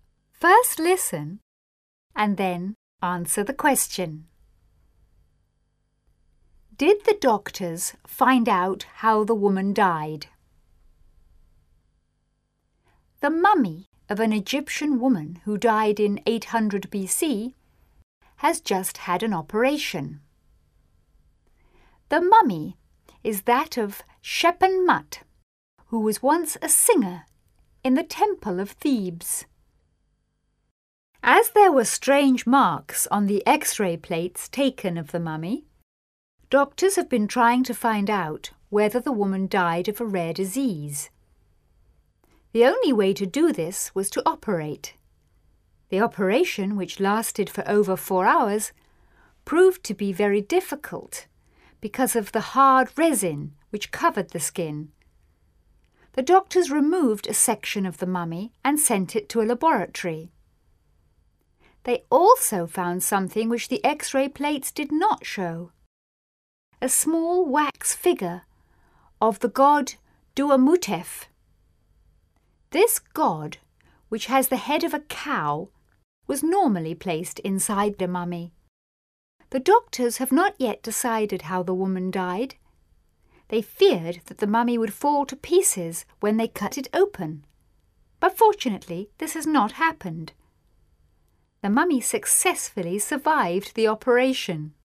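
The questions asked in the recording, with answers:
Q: Did the doctors find out how the woman died?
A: No, they have not yet decided how the woman died.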